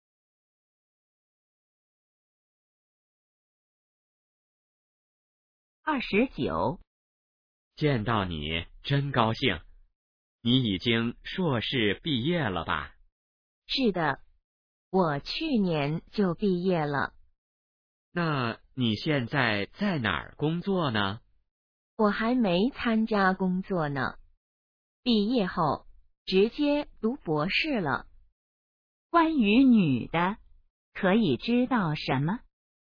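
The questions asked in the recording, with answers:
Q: 关于女的,可以知道什么?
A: 在读博士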